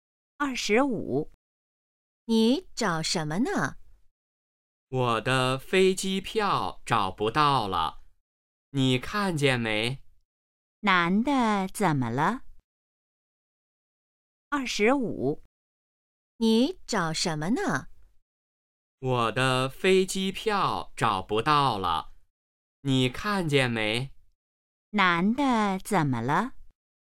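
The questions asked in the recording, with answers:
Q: 男的怎么了?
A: 飞机票找不到了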